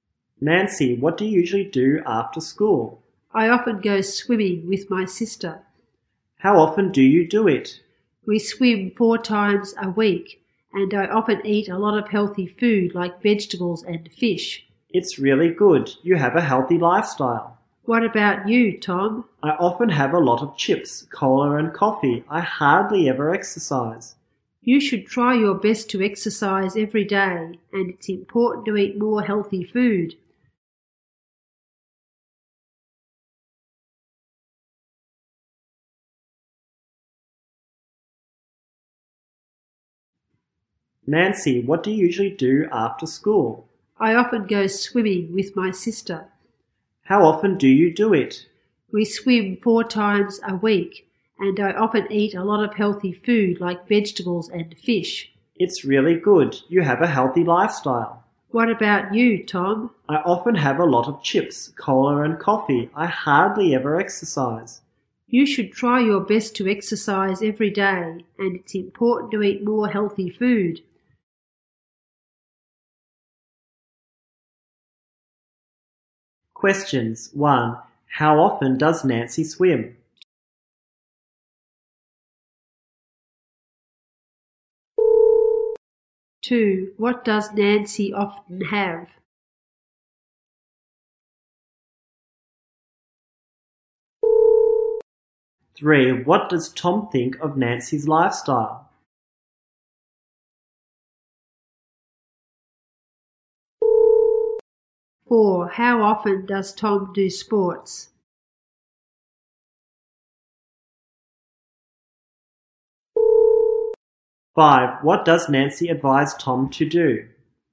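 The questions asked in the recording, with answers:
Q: How often does Nancy swim?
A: Four times a week.

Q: What does Nancy often have?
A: Healthy food like vegetables and fish.

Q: How often does Tom do sports?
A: Hardly ever.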